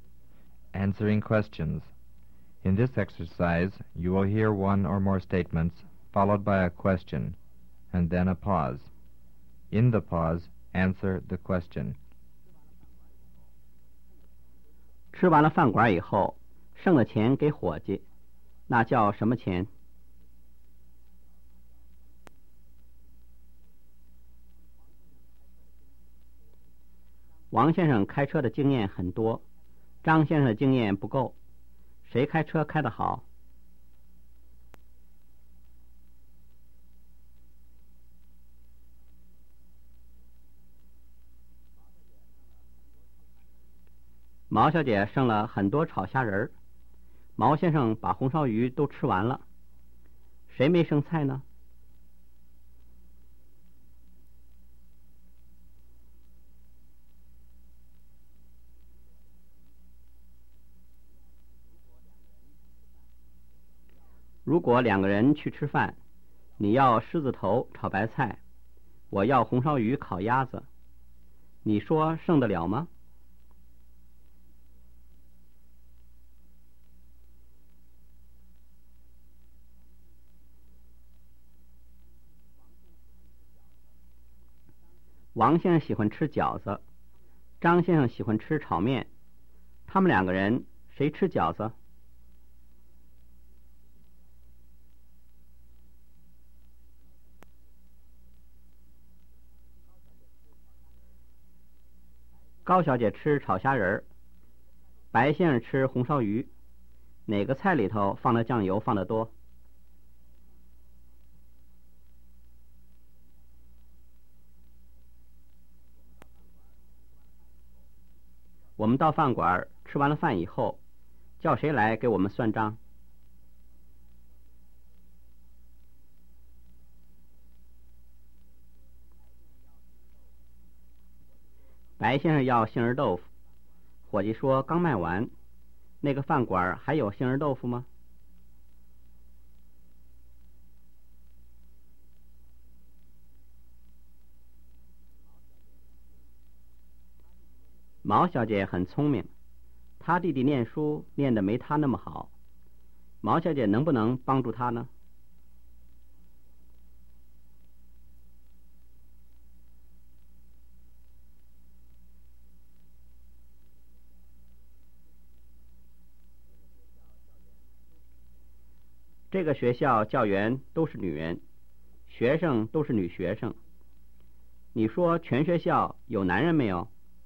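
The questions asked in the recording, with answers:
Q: 王先生开车的经验很多,张先生的经验不够,谁开车开得好?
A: 王先生

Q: 毛小姐剩了很多炒虾仁儿,毛先生把红烧鱼都吃完了,谁没剩菜呢?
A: 毛先生

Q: 王先生喜欢吃饺子,张先生喜欢吃炒面,他们两个人谁吃饺子?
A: 王先生

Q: 白先生要杏仁豆腐,伙计说刚卖完,那个饭馆还有杏仁豆腐吗?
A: 没有

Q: 这个学校教员都是女人,学生都是女学生,你说全学校有男人没有?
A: 没有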